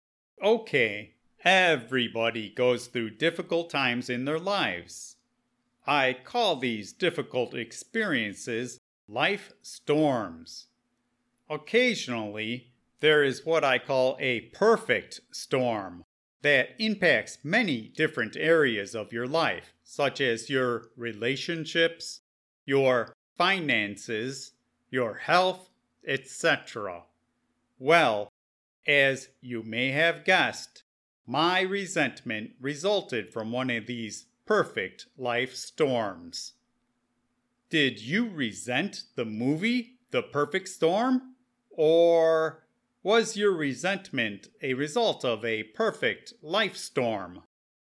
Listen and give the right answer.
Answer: No, I did not resent renting a movie.